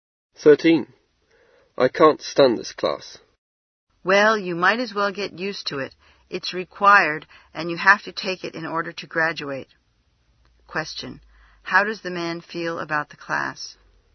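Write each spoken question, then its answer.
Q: How does the man feel about the class?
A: He dislikes it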